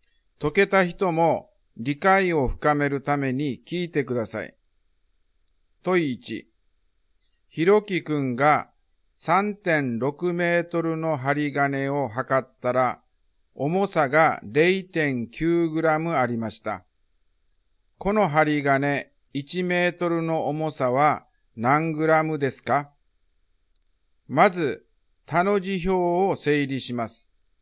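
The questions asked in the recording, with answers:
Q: この針金1メートルの重さは何グラムですか?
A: 0.25グラム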